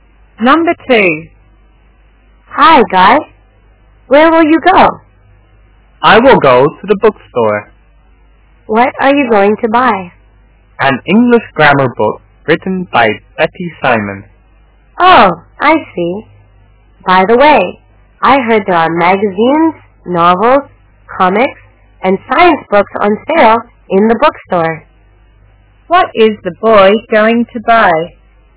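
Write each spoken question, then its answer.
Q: What is the boy going to buy?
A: An English grammar book written by Betty Simon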